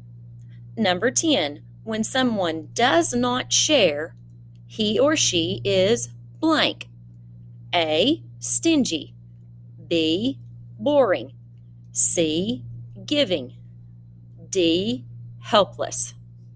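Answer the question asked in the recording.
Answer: A: stingy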